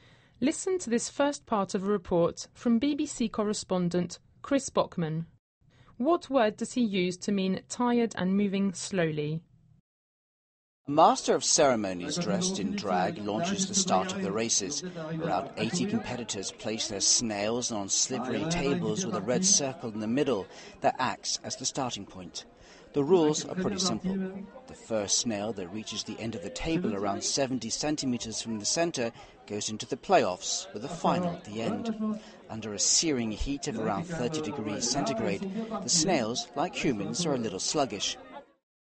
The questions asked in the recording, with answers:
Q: What word does he use to mean tired and moving slowly?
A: Yes, it was sluggish.